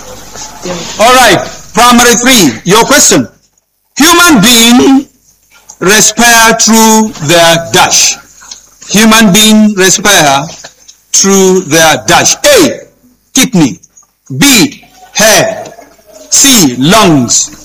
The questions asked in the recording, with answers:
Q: Human beings respire through their dash.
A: Sea lungs.